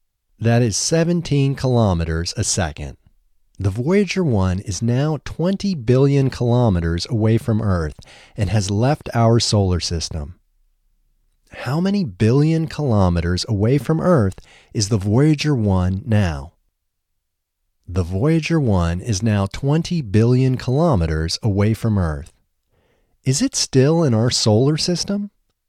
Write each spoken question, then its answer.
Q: How many billion kilometers away from Earth is the Voyager 1 now?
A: The Voyager 1 is now 20 billion kilometers away from Earth.

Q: Is it still in our solar system?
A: No, it isn't still in our solar system.